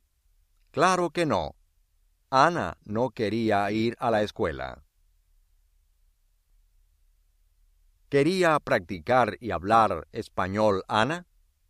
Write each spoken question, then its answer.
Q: ¿Quería practicar y hablar español, Ana?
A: Sí.